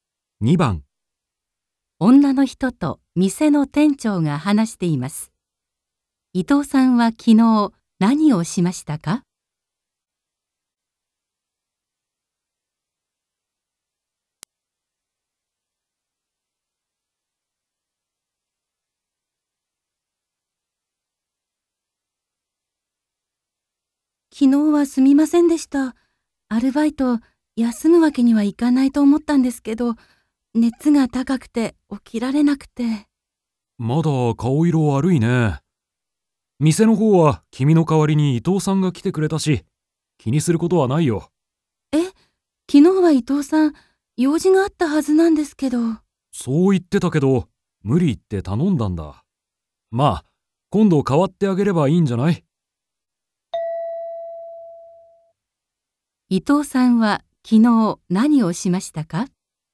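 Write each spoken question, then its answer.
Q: 伊藤さんは昨日何をしましたか?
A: 女の人の代わりに店でアルバイトをした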